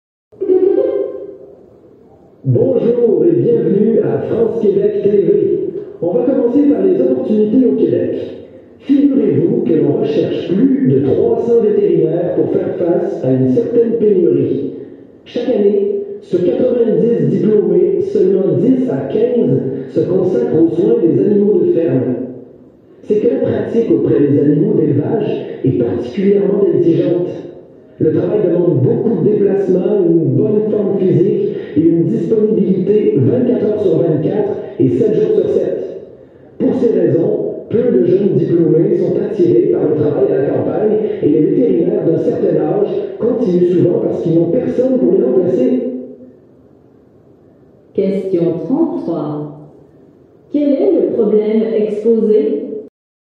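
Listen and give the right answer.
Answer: La pénurie de vétérinaires pour les animaux de ferme au Québec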